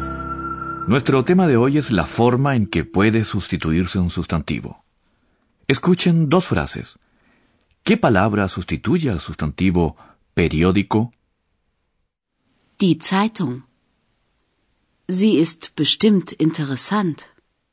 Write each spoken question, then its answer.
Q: ¿Qué palabra sustituye al sustantivo periódico?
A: A la palabra periódico la sustituye el pronombre sie.